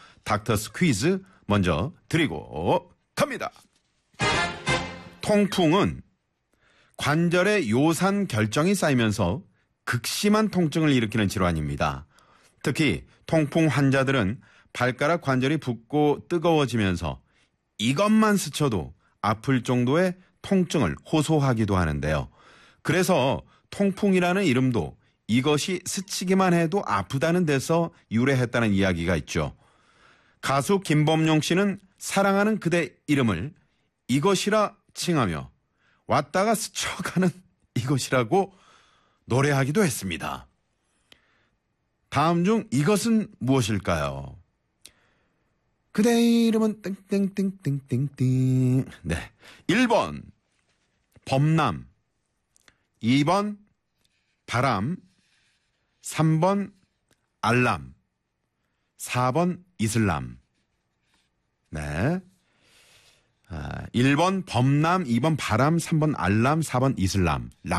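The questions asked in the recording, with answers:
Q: 다음 중 이것은 무엇일까요?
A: 2: 바람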